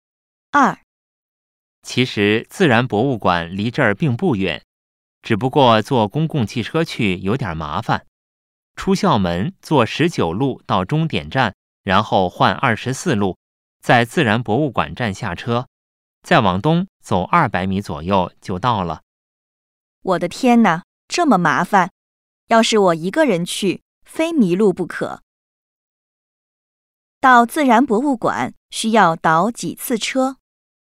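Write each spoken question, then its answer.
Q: 到自然博物馆需要倒几次车?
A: 一次(从19路换24路)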